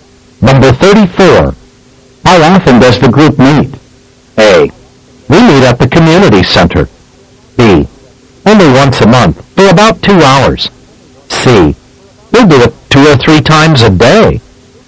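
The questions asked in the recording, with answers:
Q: How often does the group meet?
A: B: Only once a month, for about 2 hours.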